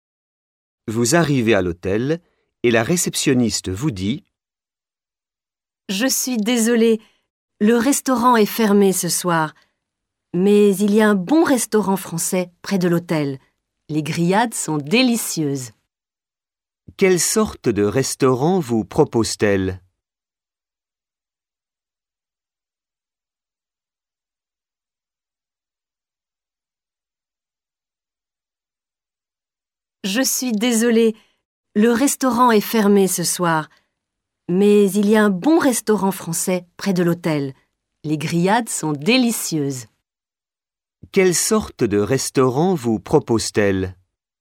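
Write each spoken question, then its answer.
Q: Quelle sorte de restaurant vous propose-t-elle?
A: Un restaurant français (grillades)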